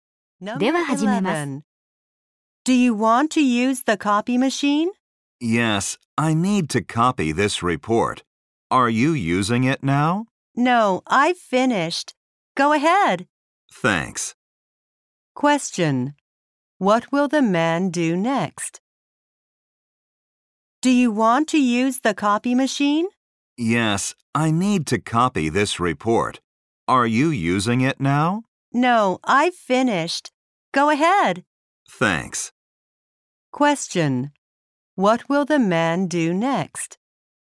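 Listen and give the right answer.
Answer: Copy his report.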